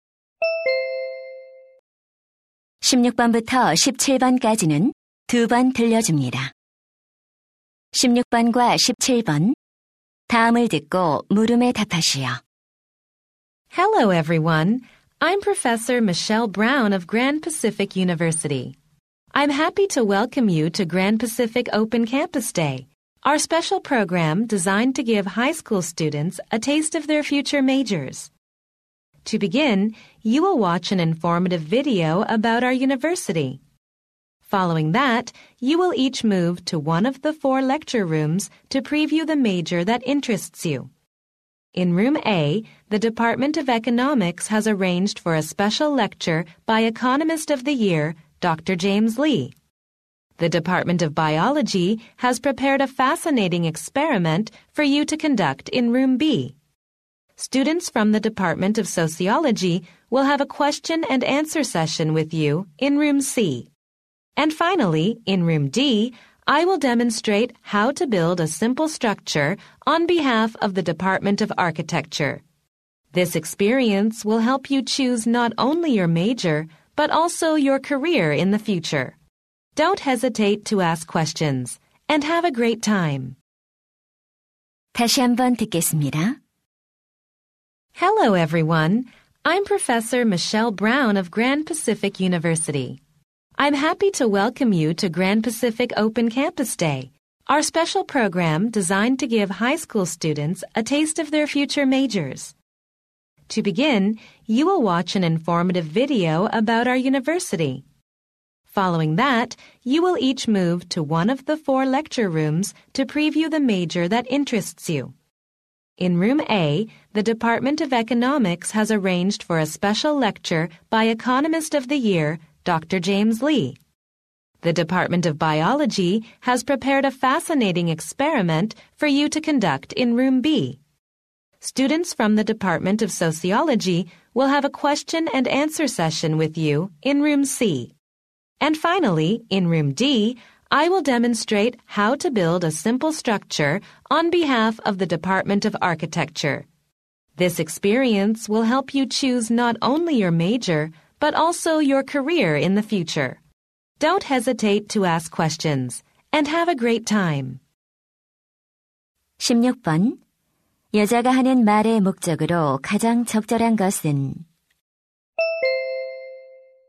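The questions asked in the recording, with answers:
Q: 여자가 하는 말의 목적으로 가장 적절한 것은?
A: 오픈 캠퍼스 데이 프로그램을 소개하려고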